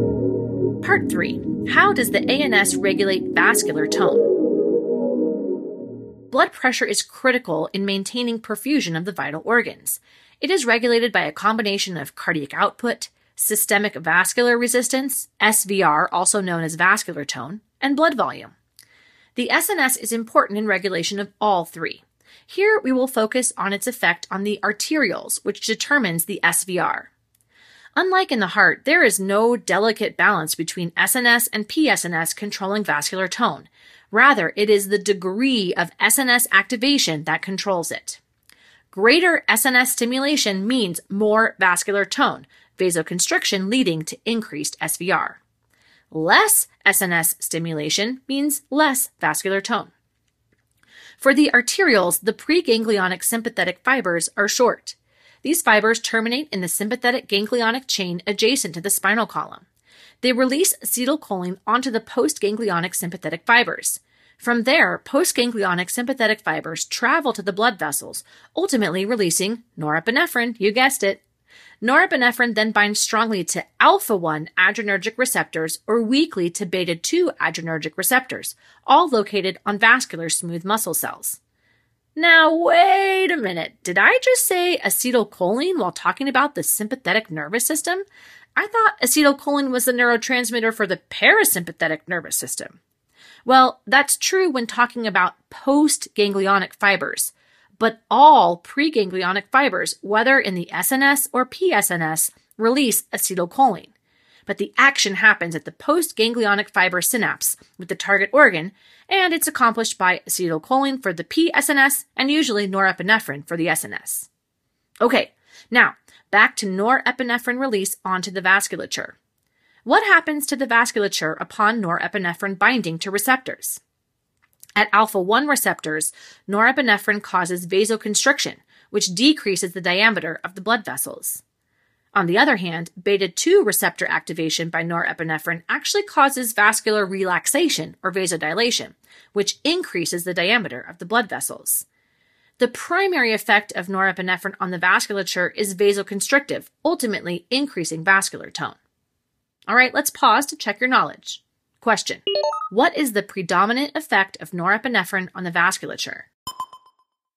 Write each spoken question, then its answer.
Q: What is the predominant effect of norepinephrine on the vasculature?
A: the predominant effect of norepinephrine on the vasculature is vasoconstriction through the activation of alpha-1 receptors.